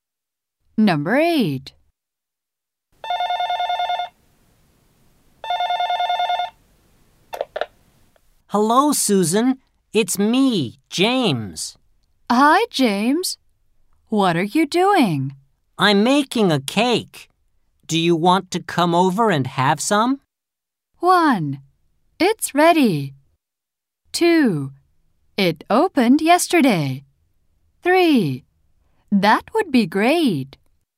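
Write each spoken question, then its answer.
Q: I'm making a cake. Do you want to come over and have some?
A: 3: That would be great.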